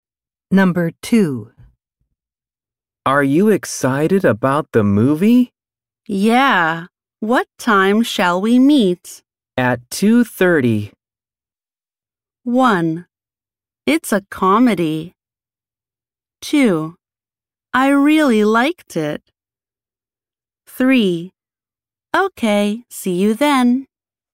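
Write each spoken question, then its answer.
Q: At 2:30.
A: 3: Okay, see you then.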